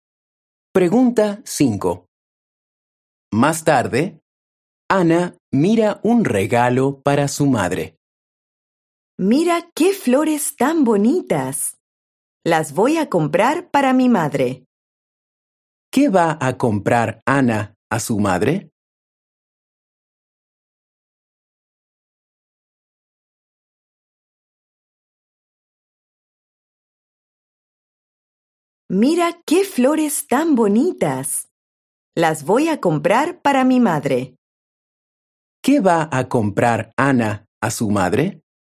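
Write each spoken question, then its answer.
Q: ¿Qué va a comprar Ana a su madre?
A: Flores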